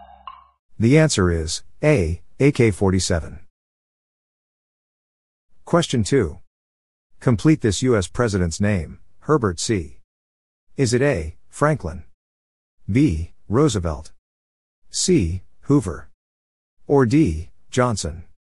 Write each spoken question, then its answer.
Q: Complete this U.S. president's name, Herbert C.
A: The answer is C, Hoover.